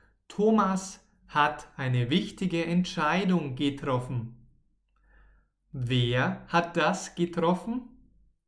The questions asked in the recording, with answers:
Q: Wer hat das getroffen?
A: Thomas, unser Freund Thomas.